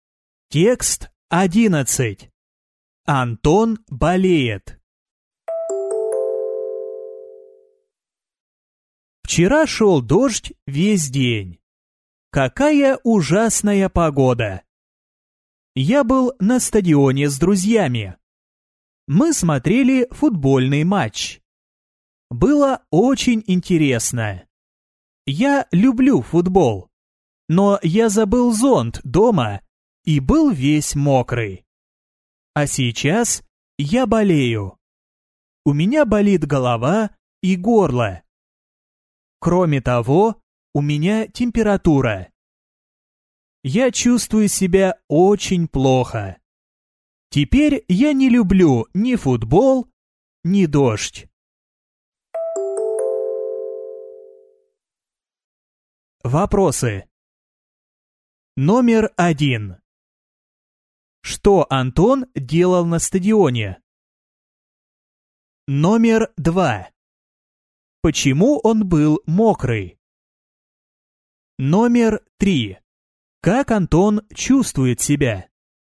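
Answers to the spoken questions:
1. Смотрел футбольный матч
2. Он забыл зонт дома, а шёл дождь
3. Очень плохо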